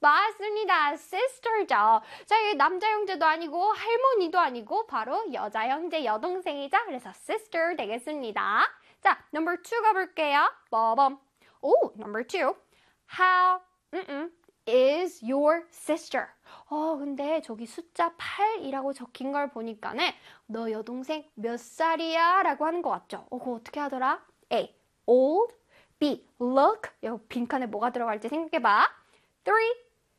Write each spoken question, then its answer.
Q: How, is your sister?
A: 맞습니다. 정답은 old가 들어가겠죠?